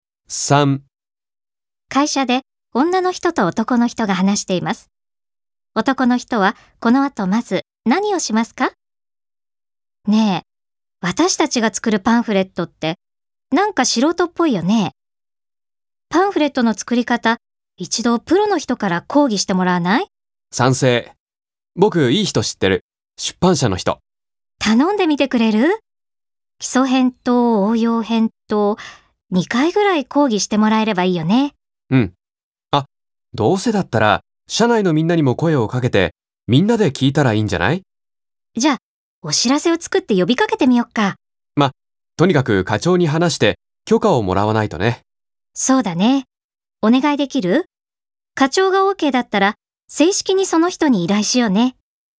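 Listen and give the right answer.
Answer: 課長に話して許可をもらう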